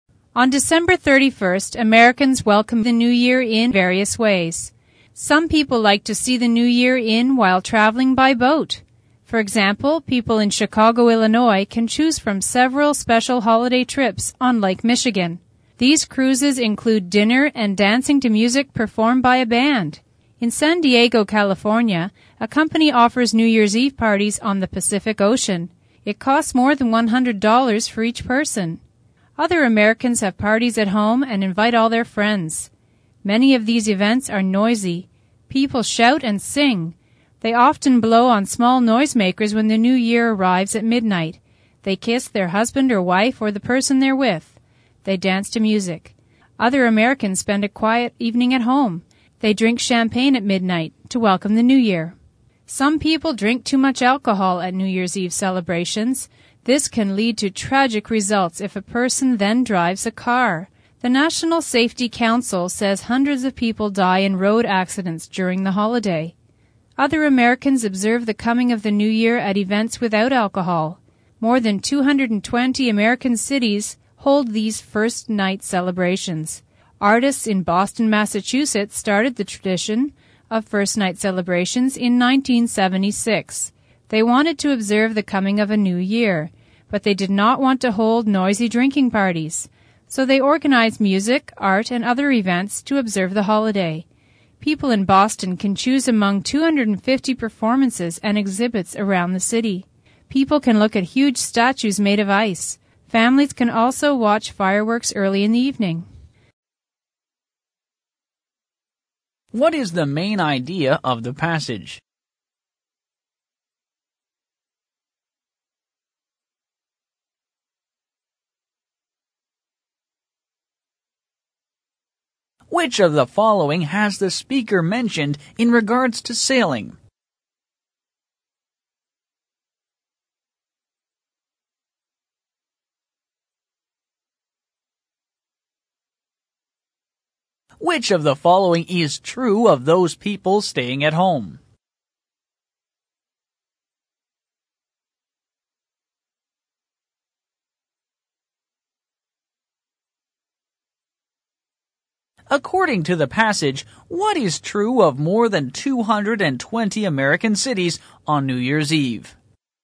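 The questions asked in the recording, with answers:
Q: What is the main idea of the passage?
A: Americans welcome the New Year in various ways

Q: According to the passage, what is true of more than 220 American cities on New Year's Eve?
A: They hold first night celebrations without alcohol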